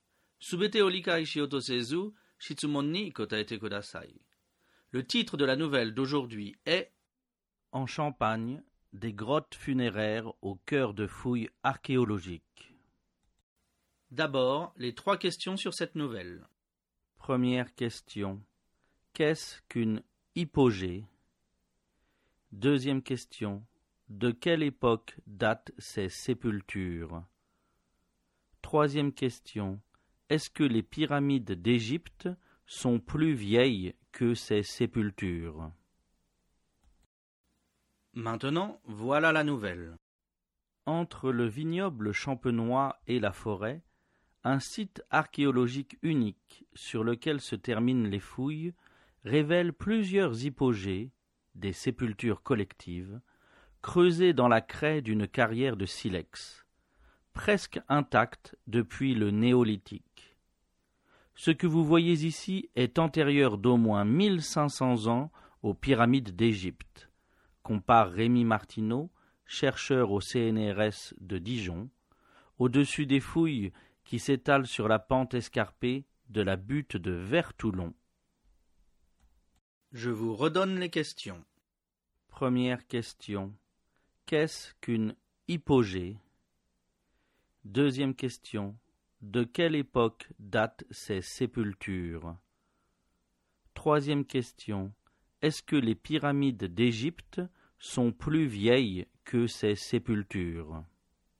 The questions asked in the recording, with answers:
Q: Qu'est-ce qu'une hypogée?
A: Une hypogée est une sépulture collective.

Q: De quelle époque datent ces sépultures?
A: Ces sépultures datent du néolithique.

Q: Est-ce que les pyramides d'Égypte sont plus vieilles que ces sépultures?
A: Non, ces sépultures sont 1500 ans plus vieilles que les pyramides.